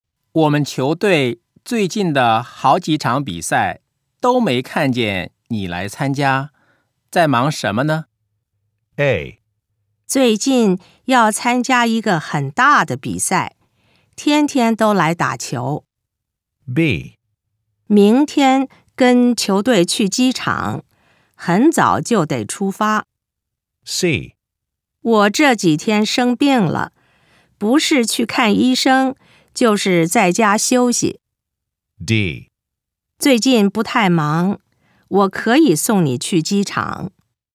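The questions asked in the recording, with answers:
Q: 我们球队最近的好几场比赛都没看见你来参加,在忙什么呢?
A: C: 我这几天生病了,不是去看医生,就是在家休息。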